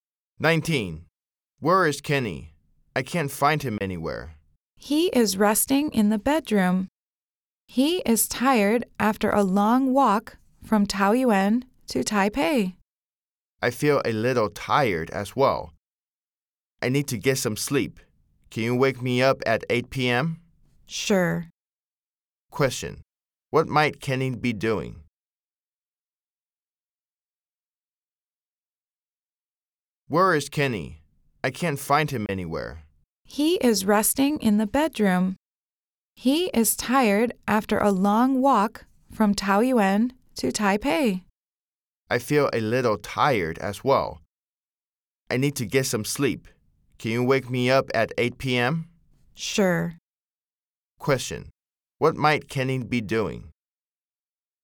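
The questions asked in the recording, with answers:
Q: Question. What might Kenny be doing?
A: Resting in the bedroom.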